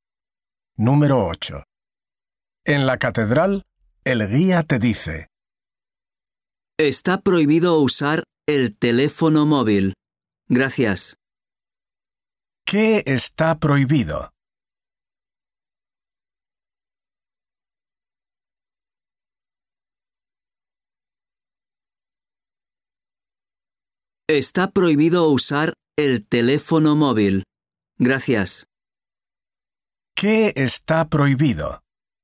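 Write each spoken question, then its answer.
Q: ¿Qué está prohibido?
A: Usar el teléfono móvil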